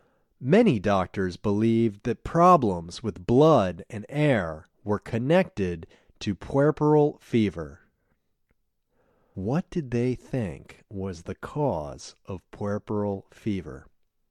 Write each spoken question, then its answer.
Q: What did they think was the cause of puerperal fever?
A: They thought that problems with blood and air were connected to puerperal fever.